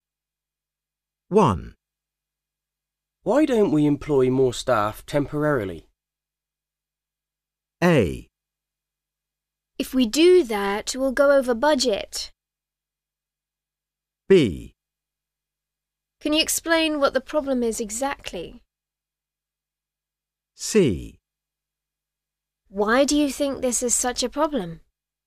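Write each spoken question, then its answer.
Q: Why don't we employ more staff temporarily?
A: A: If we do that, we'll go over budget.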